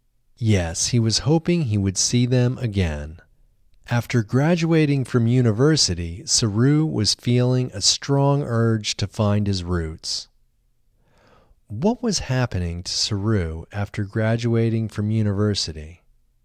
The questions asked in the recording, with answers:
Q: What was happening to Saru after graduating from university?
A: After graduating from university, Saru was feeling a strong urge to find his roots.